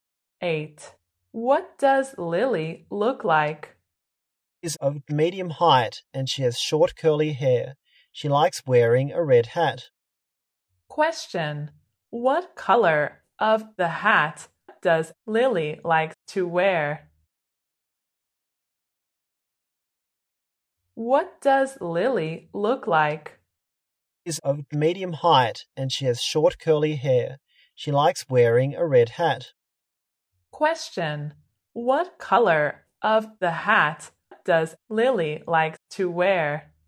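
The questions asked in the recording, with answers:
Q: What color of the hat does Lily like to wear?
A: Red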